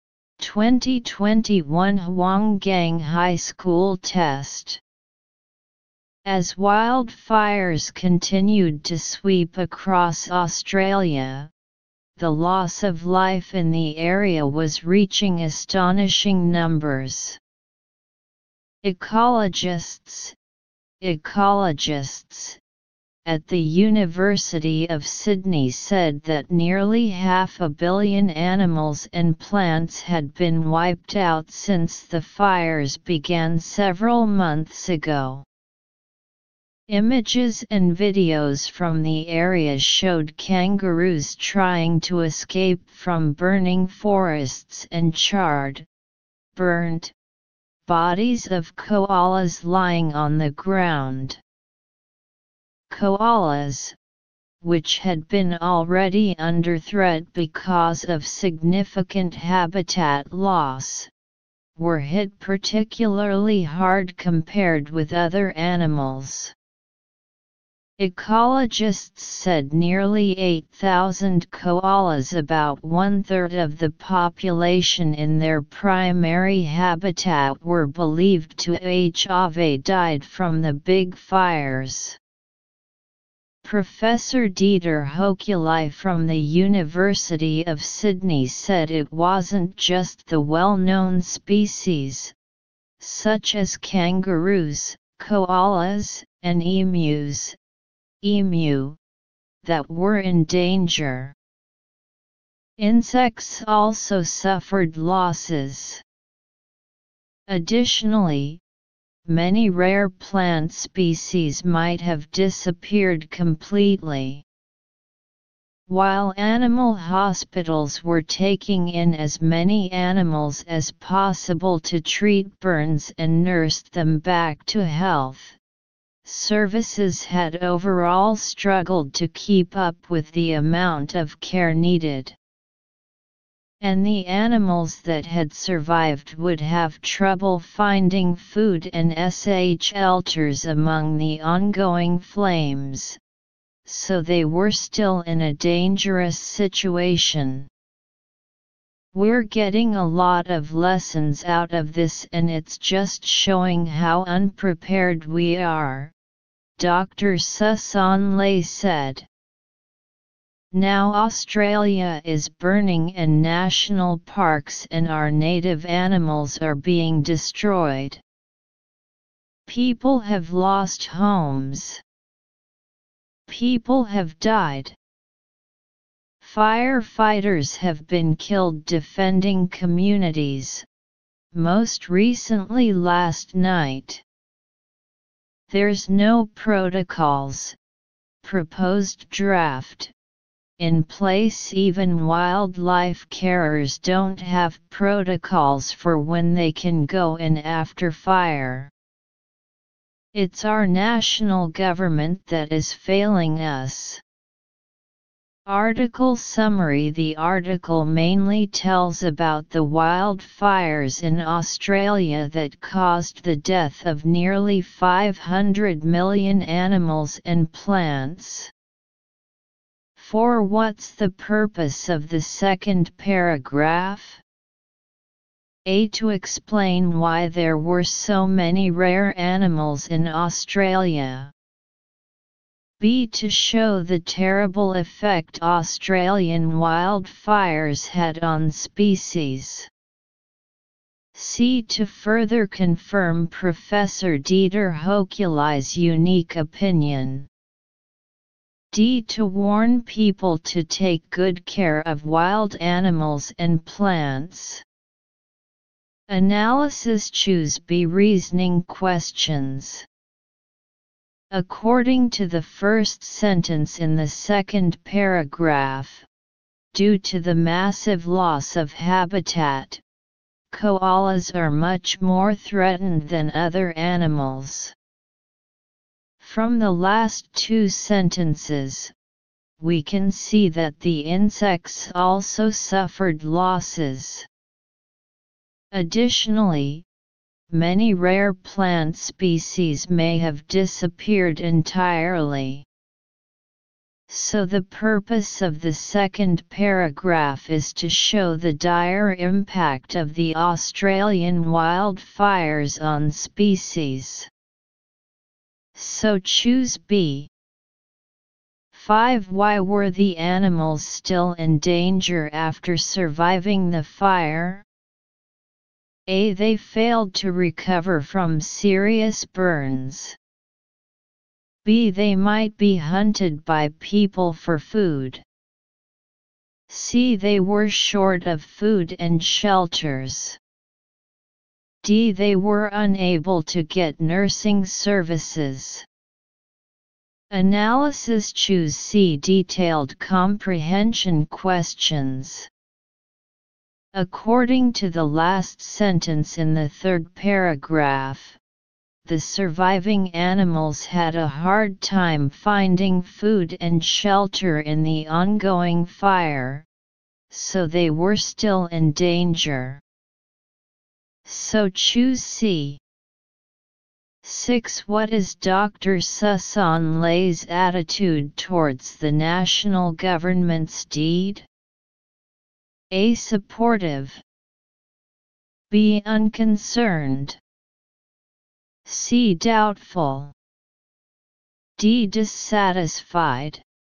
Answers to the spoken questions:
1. Choose B.
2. Choose C.
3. Choose D.